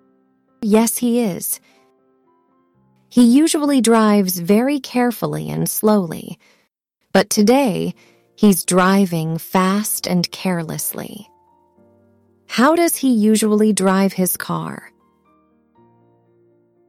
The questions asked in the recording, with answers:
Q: How does he usually drive his car?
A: Carefully and slowly.